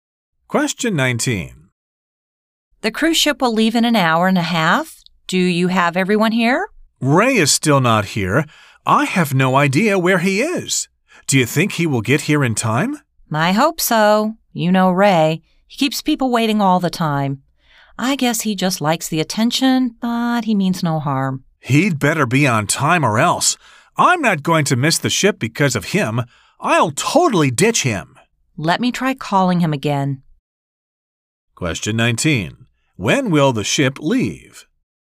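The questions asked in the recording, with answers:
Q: When will the ship leave?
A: In an hour and a half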